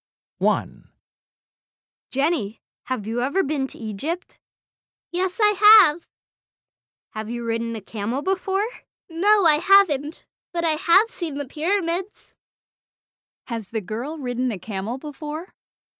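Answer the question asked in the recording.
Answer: No, she hasn't.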